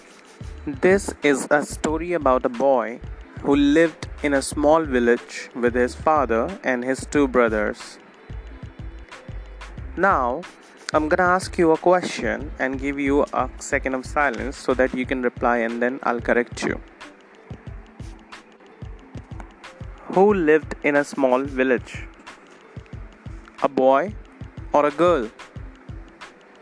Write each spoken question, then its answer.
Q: Who lived in a small village?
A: A boy. The correct answer is a boy.